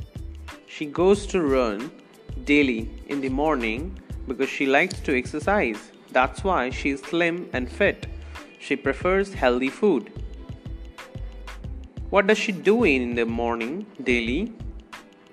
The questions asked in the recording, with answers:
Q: What does she do in the morning daily?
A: She goes to run daily in the morning.